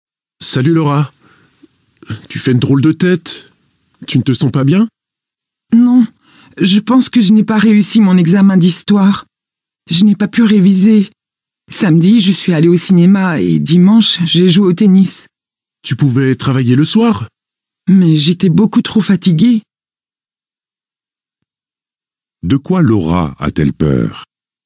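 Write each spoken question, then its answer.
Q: De quoi Laura a-t-elle peur?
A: D'avoir raté son examen d'histoire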